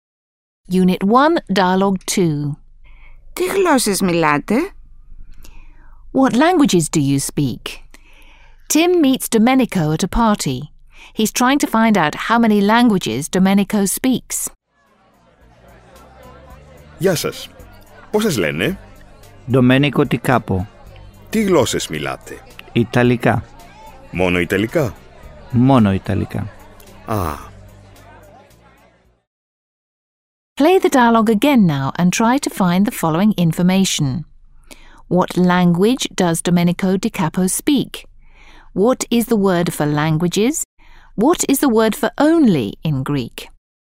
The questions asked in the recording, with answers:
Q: What language does Domenico Di Capo speak?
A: Domenico speaks Italian.

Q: What is the word for languages?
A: The word for languages is γλώσσες.

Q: What is the word for only in Greek?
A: And the word for only is μόνο.